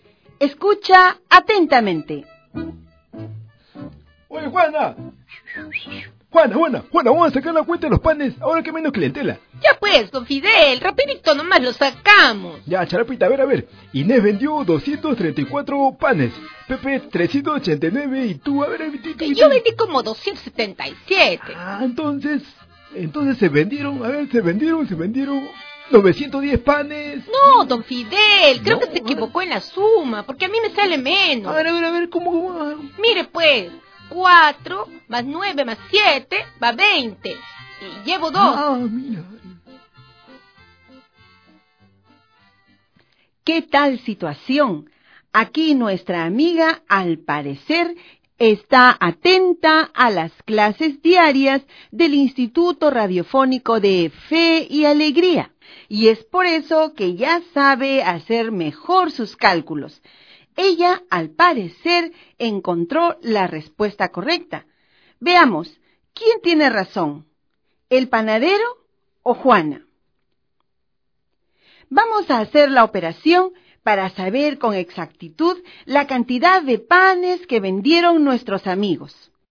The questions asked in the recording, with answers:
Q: Veamos, ¿quién tiene razón? ¿El panadero o Juana?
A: Pero Juana sumó 900. Esta sí es la respuesta correcta.